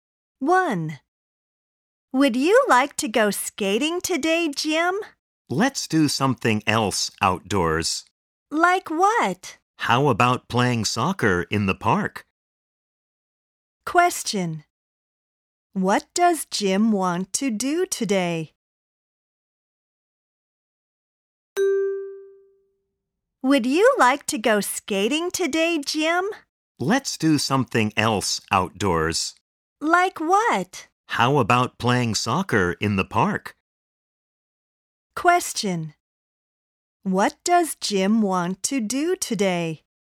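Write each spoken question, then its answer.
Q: What does Jim want to do today?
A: Play soccer in the park.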